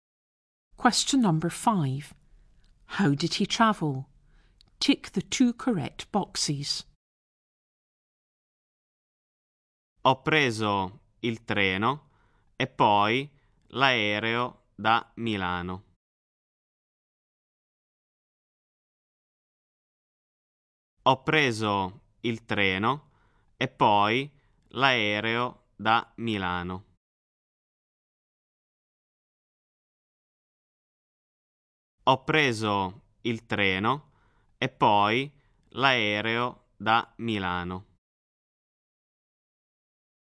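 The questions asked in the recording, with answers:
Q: How did he travel?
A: By train and then by plane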